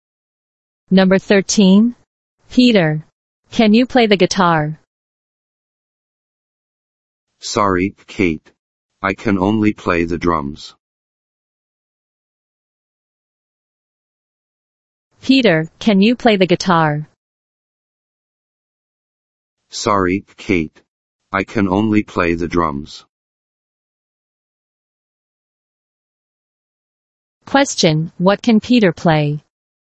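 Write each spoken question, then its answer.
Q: Question, what can Peter play?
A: The drums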